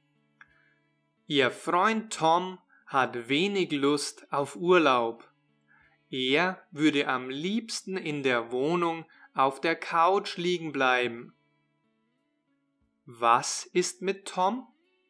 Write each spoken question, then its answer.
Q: Was ist mit Tom?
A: Er hat wenig Lust auf Urlaub.